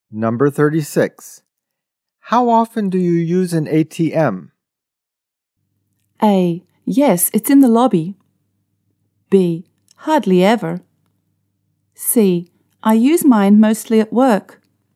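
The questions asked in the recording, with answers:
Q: How often do you use an ATM?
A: B: Hardly ever.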